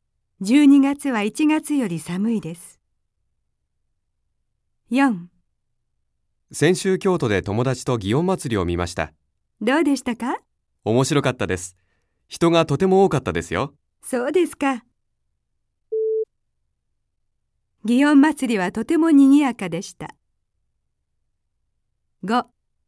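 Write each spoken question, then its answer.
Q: 祇園祭りはとても賑やかでした。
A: ○ (正しい)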